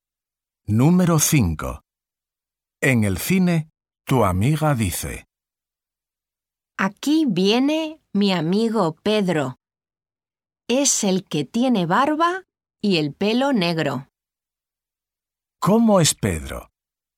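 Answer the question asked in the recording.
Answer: tiene barba y el pelo negro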